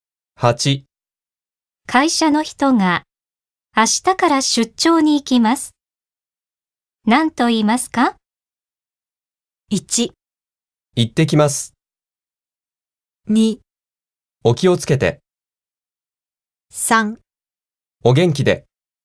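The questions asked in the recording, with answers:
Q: 会社の人が明日から出張に行きます。何と言いますか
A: 2: お気をつけて。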